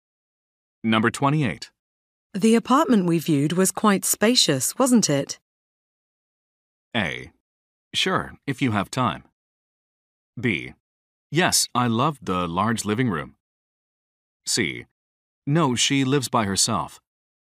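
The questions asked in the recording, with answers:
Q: The apartment we viewed was quite spacious, wasn't it?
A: B: Yes, I loved the large living room.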